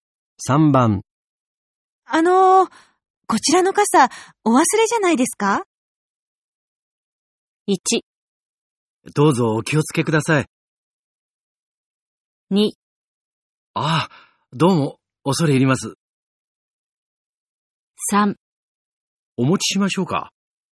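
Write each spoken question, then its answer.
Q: こちらの傘お忘れじゃないですか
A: 2: ああどうも恐れ入ります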